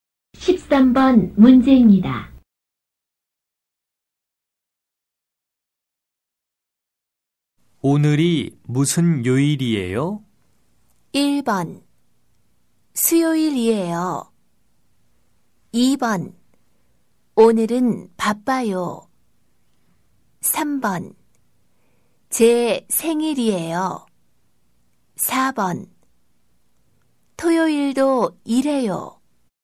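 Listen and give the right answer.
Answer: 1: 수요일이에요.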